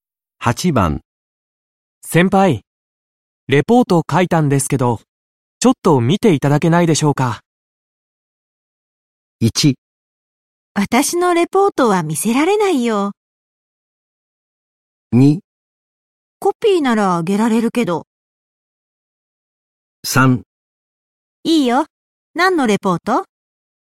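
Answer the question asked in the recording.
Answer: 3: いいよ、何のレポート?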